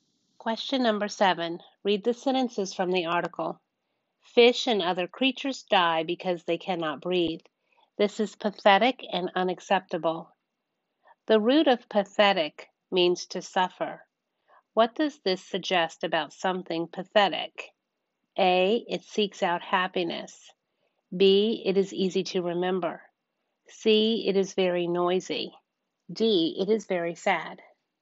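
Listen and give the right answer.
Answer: D: It is very sad.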